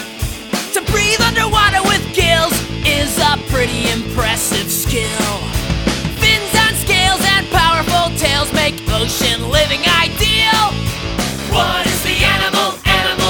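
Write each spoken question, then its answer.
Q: What is the animal?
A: Fish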